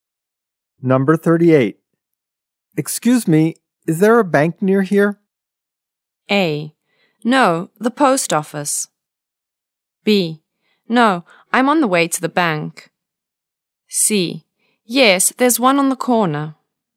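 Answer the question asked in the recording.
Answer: C: Yes, there's one on the corner.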